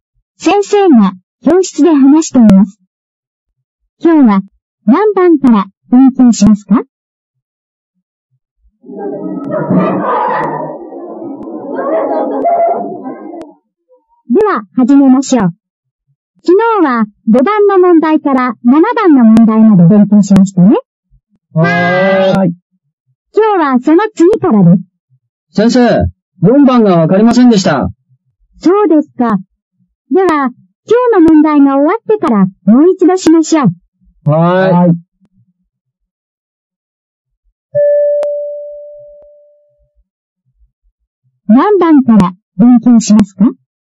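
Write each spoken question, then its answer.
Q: 何番から勉強しますか?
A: 8番から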